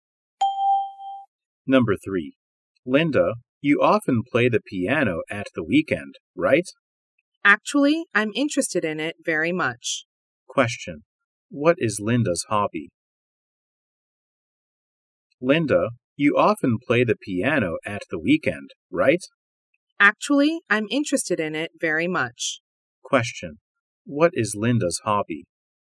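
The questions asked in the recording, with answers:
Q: What is Linda's hobby?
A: Playing the piano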